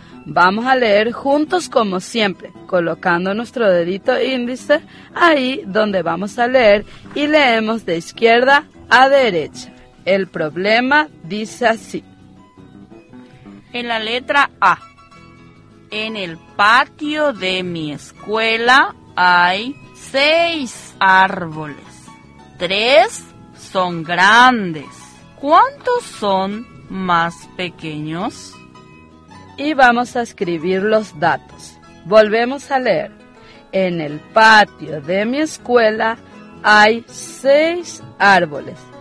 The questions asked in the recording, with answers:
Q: 3 son grandes. ¿Cuántos son más pequeños?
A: No, profe Julia, queda 3.